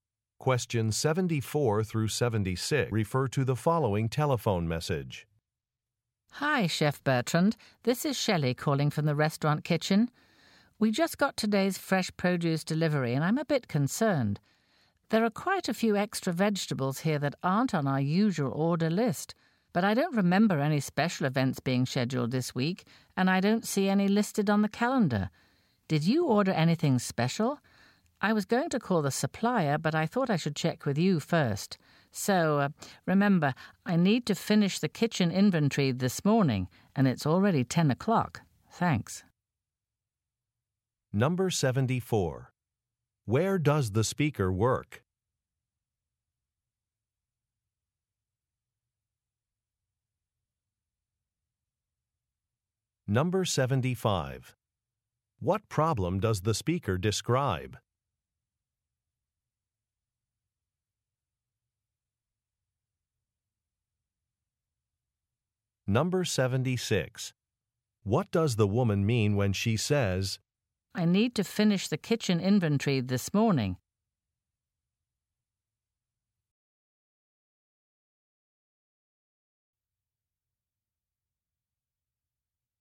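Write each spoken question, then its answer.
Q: Where does the speaker work?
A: At a restaurant (in the kitchen)

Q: What problem does the speaker describe?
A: The produce delivery had extra vegetables that weren't ordered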